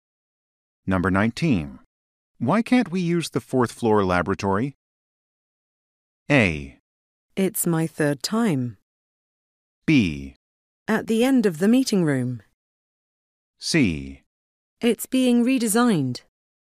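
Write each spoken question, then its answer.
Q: Why can't we use the fourth floor laboratory?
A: C: It's being redesigned.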